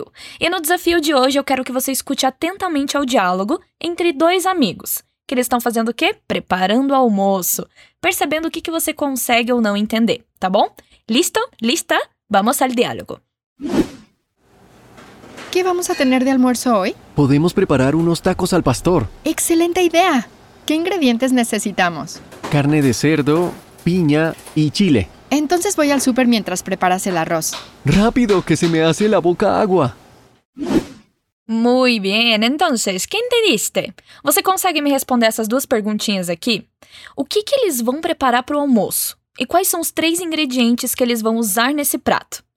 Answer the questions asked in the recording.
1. Tacos al pastor.
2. Carne de cerdo, pinha e chile.